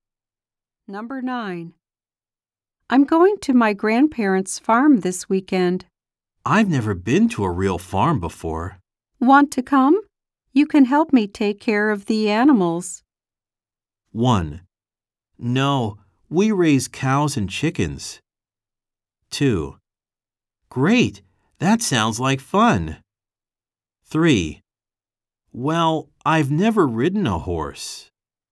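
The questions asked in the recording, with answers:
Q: Want to come? You can help me take care of the animals.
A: 2: Great! That sounds like fun!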